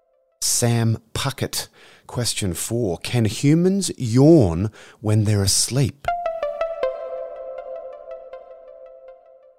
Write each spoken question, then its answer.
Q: Can humans yawn when they're asleep?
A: Yes, they can. It's extremely rare, but they can.